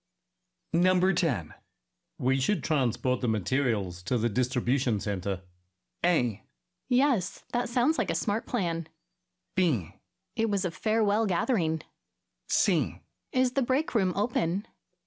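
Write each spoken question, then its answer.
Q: We should transport the materials to the distribution center.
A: A: Yes, that sounds like a smart plan.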